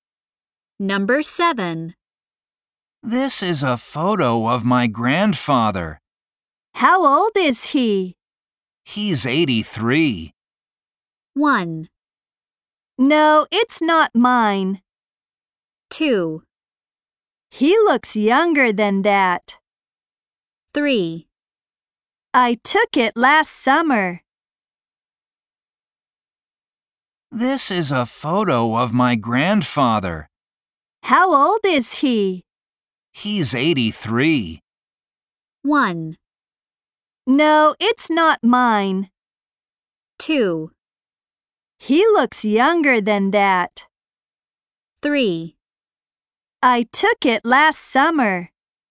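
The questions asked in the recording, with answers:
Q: He's 83.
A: 2: He looks younger than that.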